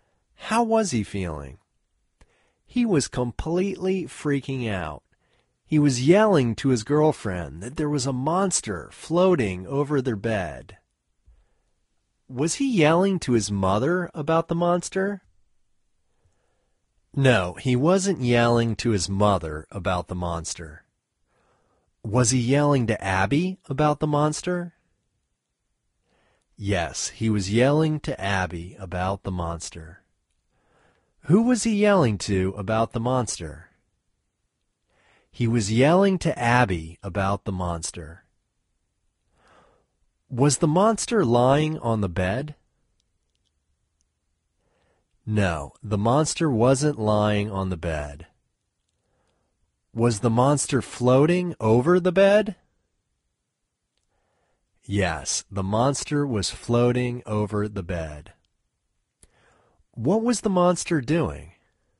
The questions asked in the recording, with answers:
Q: Was he yelling to his mother about the monster?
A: No, he wasn't yelling to his mother about the monster.

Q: Was he yelling to Abby about the monster?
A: Yes, he was yelling to Abby about the monster.

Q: Who was he yelling to about the monster?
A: He was yelling to Abby about the monster.

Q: Was the monster lying on the bed?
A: No, the monster wasn't lying on the bed.